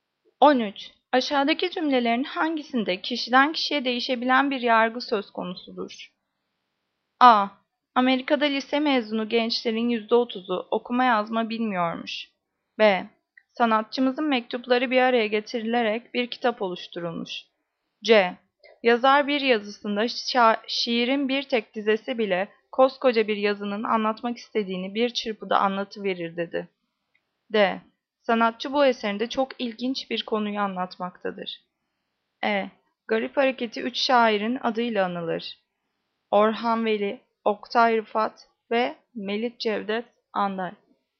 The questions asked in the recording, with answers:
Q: Aşağıdaki cümlelerin hangisinde kişiden kişiye değişebilen bir yargı söz konusudur?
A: Cevap D. Sanatçı bu eserinde çok ilginç bir konuyu anlatmaktadır.